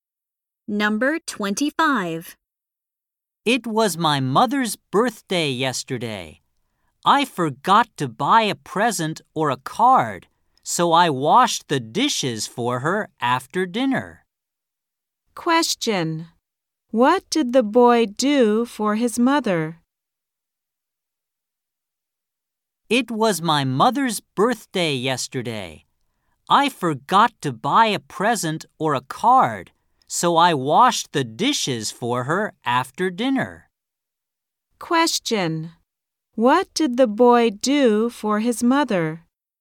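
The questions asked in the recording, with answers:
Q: What did the boy do for his mother?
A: He washed the dishes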